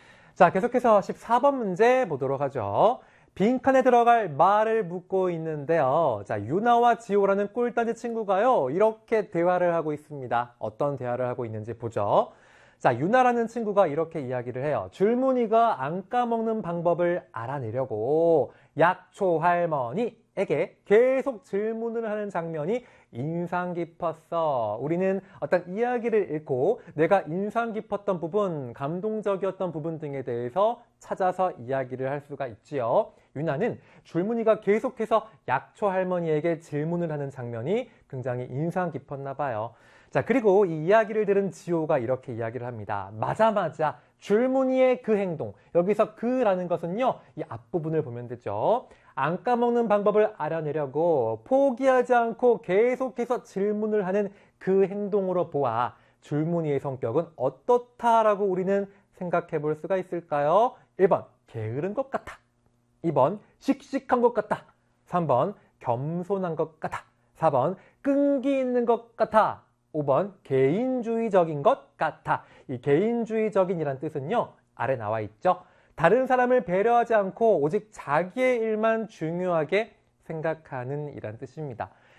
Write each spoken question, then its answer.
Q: 안 까먹는 방법을 알아내려고 포기하지 않고 계속해서 질문을 하는 그 행동으로 보아 줄무늬의 성격은 어떻다라고 우리는 생각해 볼 수가 있을까요?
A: 정답 4번 끈기 있는 것 같아